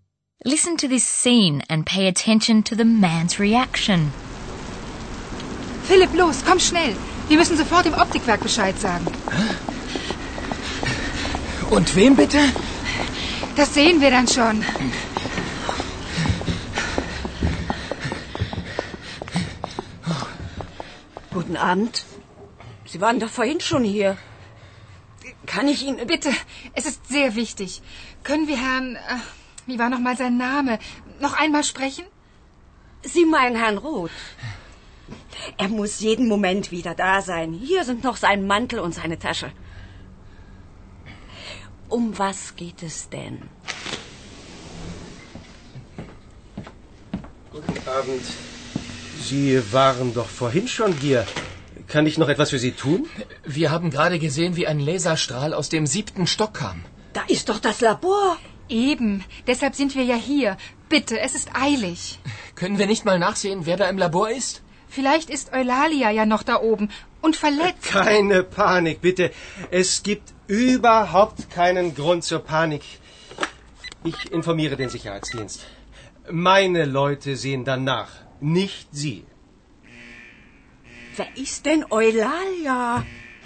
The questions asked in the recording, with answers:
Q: Listen to this scene and pay attention to the man's reaction.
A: The man reacts calmly, or at least he pretends to be calm.